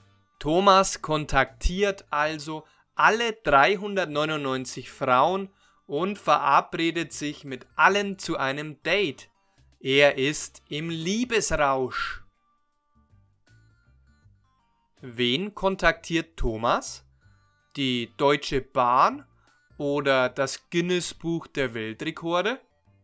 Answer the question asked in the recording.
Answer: Weder noch. Thomas kontaktiert nicht die Deutsche Bahn oder das Guinness-Buch der Weltrekorde.